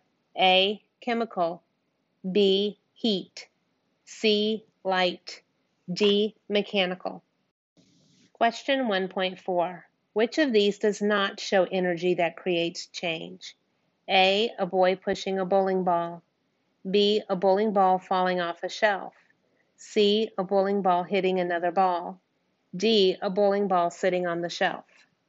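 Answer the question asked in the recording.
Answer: D: A bowling ball sitting on the shelf.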